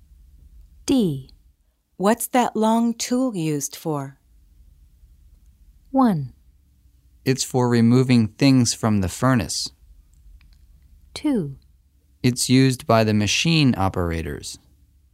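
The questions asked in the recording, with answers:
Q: What's that long tool used for?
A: 1: It's for removing things from the furnace.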